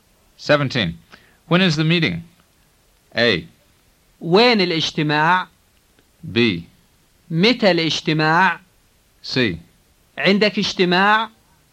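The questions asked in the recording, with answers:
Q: When is the meeting?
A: B: متى الاجتماع؟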